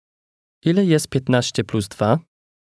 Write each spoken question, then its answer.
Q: Ile jest 15 plus 2?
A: 17.